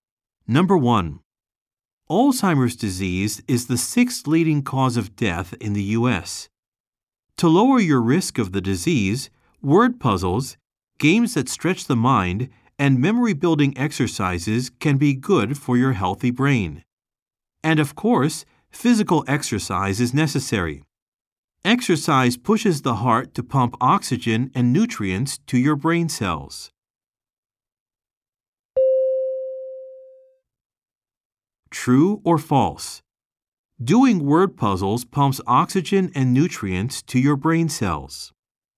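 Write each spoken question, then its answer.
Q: True or false? Doing word puzzles pumps oxygen and nutrients to your brain cells.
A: False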